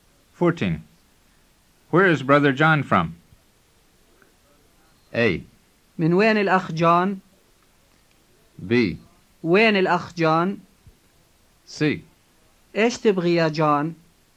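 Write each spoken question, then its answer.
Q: Where is brother John from?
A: A: من وين الأخ جون؟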